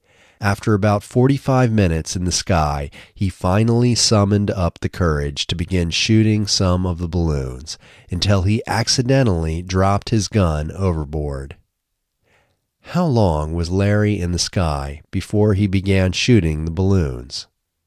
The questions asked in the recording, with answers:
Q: How long was Larry in the sky before he began shooting the balloons?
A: He was in the sky for about 45 minutes before he finally began shooting the balloons.